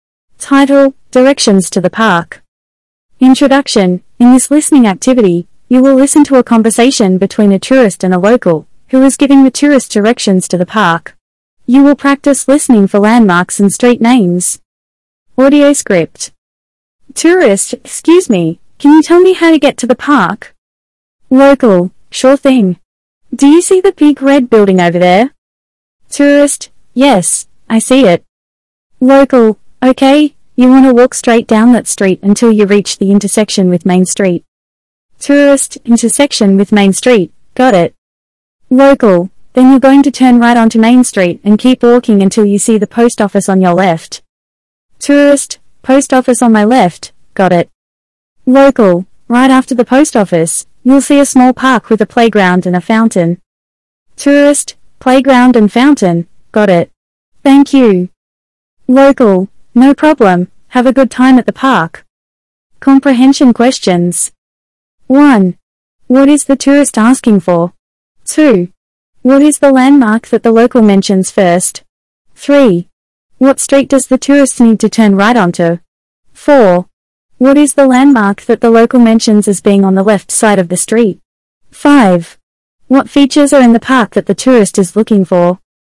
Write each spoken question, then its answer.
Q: What is the tourist asking for?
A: The tourist is asking for directions to the park.

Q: What is the landmark that the local mentions first?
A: The landmark that the local mentions first is a big red building.

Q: What street does the tourist need to turn right onto?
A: The tourist needs to turn right onto Main Street.

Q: What is the landmark that the local mentions as being on the left side of the street?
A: The landmark that the local mentions as being on the left side of the street is the post office.

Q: What features are in the park that the tourist is looking for?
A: The park has a playground and a fountain.